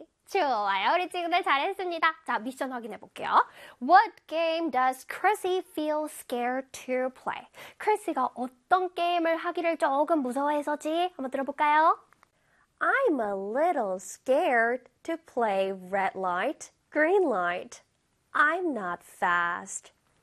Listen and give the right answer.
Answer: 그래서 정답은 red light. Green light 되겠습니다.